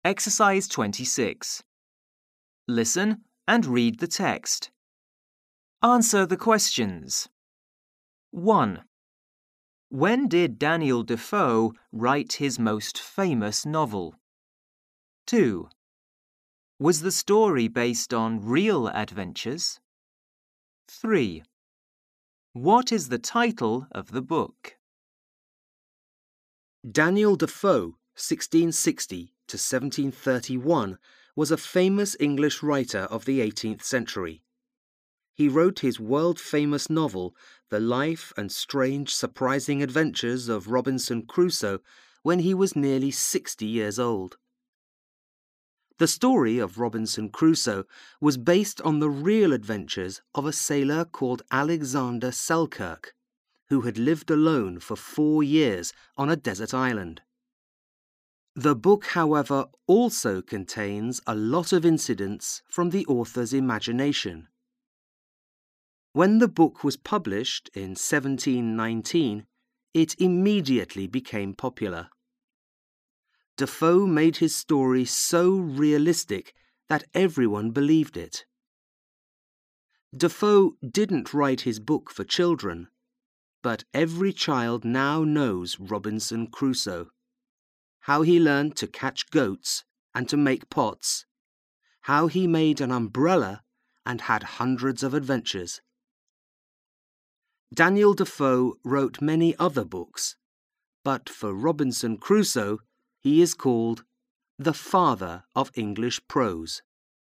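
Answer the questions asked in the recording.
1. When he was nearly 60 years old (published in 1719)
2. Yes, on the real adventures of the sailor Alexander Selkirk
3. The Life and Strange Surprising Adventures of Robinson Crusoe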